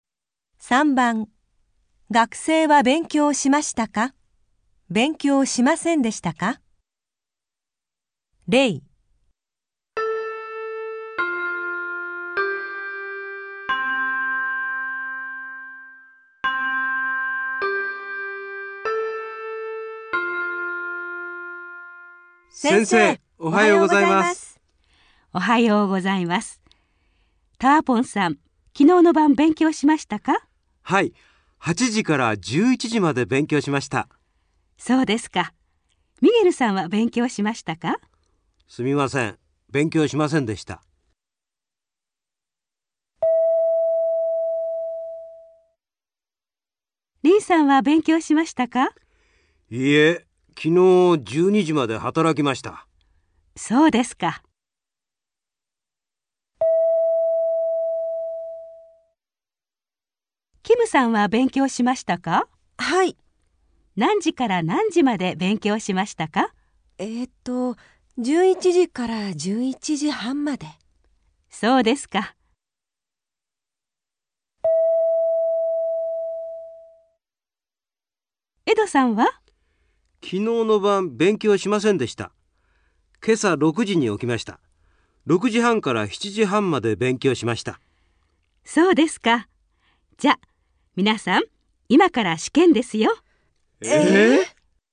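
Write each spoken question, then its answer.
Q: 学生は勉強しましたか?勉強しませんでしたか?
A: ミゲルさん:勉強しませんでした

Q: 学生は勉強しましたか?勉強しませんでしたか?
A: リンさん:勉強しませんでした

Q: 学生は勉強しましたか?勉強しませんでしたか?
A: キムさん:勉強しました(11時から11時半まで)

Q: 学生は勉強しましたか?勉強しませんでしたか?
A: エドさん:勉強しました(今朝6時半から7時半まで)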